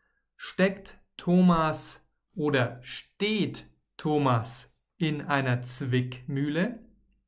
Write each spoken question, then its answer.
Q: Steckt Thomas oder steht Thomas in einer Zwickmühle?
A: Er steckt in einer Zwickmühle.